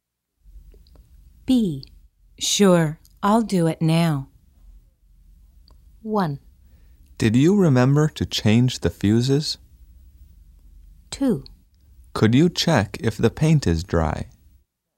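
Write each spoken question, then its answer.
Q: Sure, I'll do it now.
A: 2: Could you check if the paint is dry?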